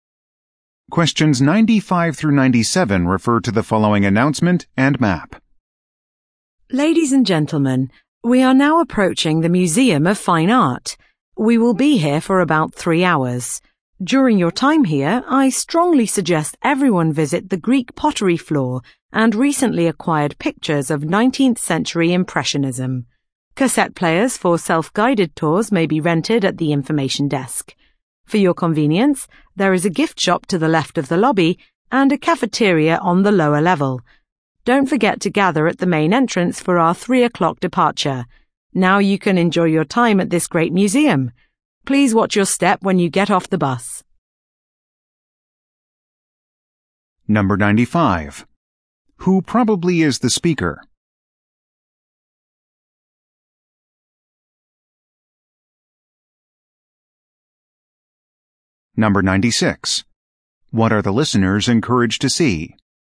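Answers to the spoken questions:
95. A tour guide
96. The Greek pottery and 19th-century Impressionist pictures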